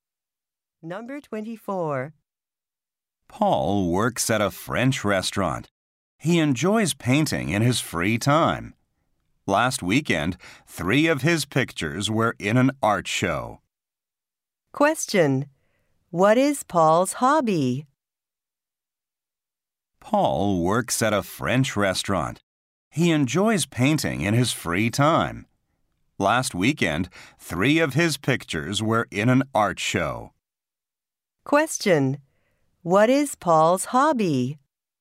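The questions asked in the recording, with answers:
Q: What is Paul's hobby?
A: Painting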